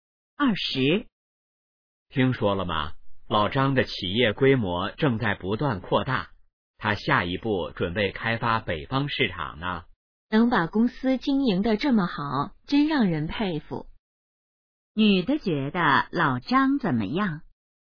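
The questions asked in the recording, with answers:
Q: 女的觉得老张怎么样?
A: 让人佩服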